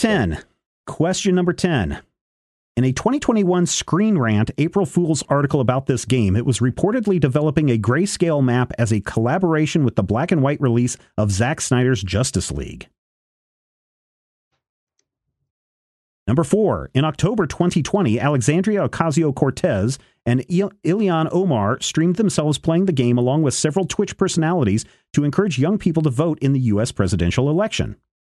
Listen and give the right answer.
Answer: is correct.